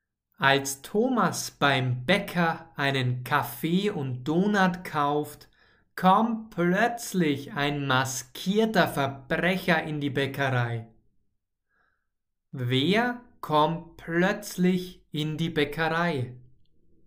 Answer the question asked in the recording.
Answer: ein maskierter Verbrecher.